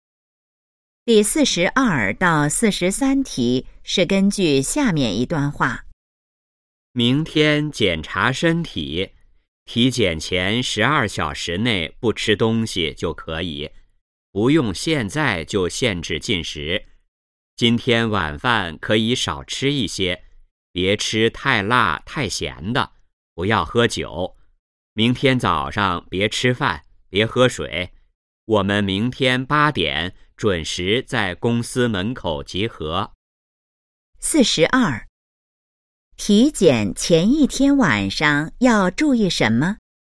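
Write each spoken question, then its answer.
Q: 体检前一天晚上要注意什么?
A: 晚饭少吃一些,别吃太辣太咸的,不要喝酒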